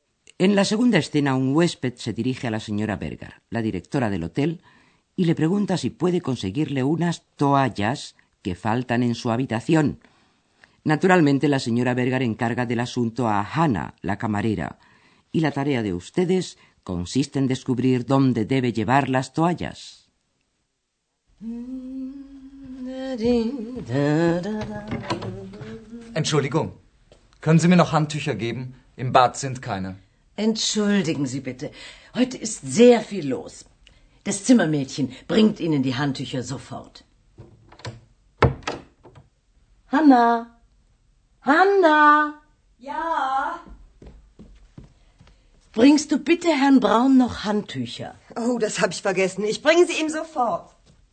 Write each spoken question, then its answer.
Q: la tarea de ustedes consiste en descubrir dónde debe llevar las toallas.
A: Hanna debe llevar las toallas a la habitación del señor Braun, que es donde faltan.